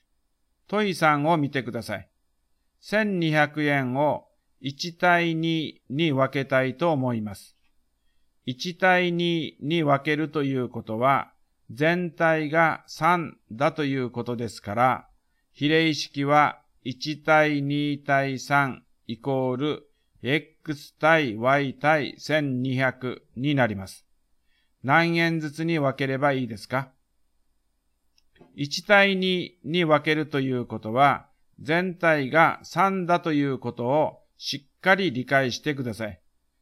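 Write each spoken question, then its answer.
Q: 何円ずつに分ければいいですか?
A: 400円と800円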